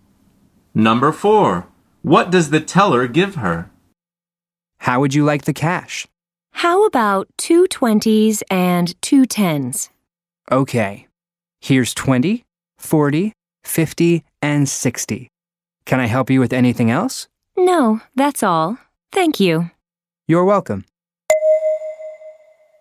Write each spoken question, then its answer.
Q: What does the teller give her?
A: The answer is 2 $20 bills and 2 $10 bills.